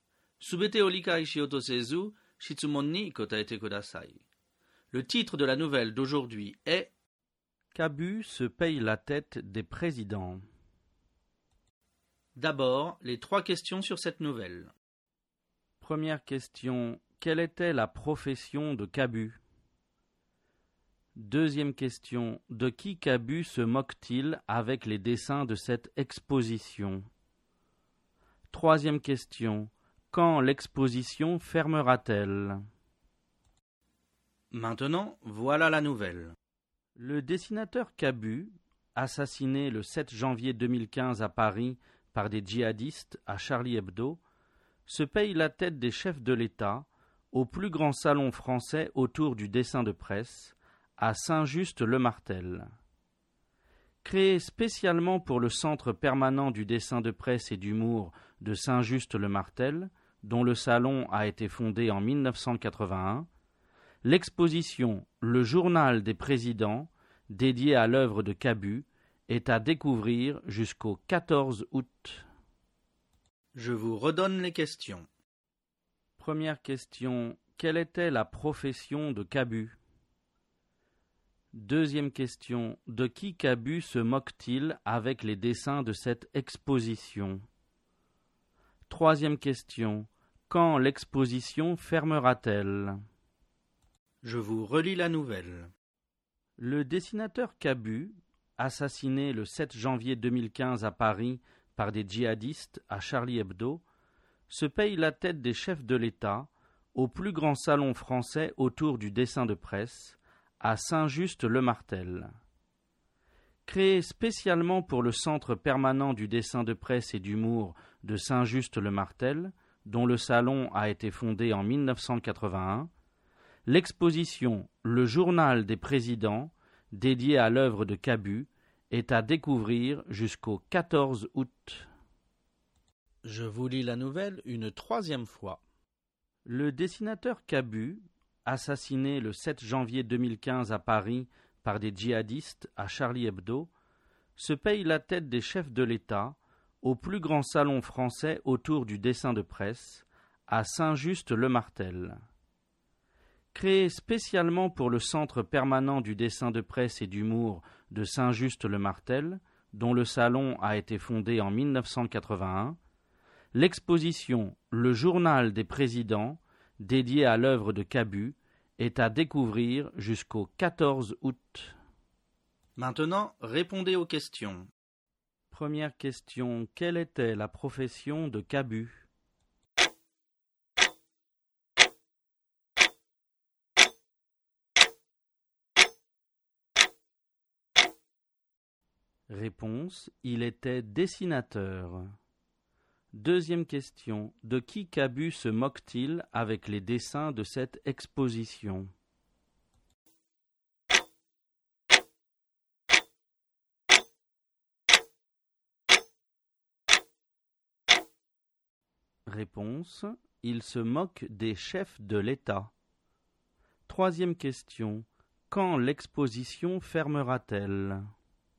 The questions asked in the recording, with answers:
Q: quelle était la profession de Kabu?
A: Réponse, il était dessinateur.

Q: quand l'exposition fermera-t-elle?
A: Réponse, l'exposition fermera le 14 août.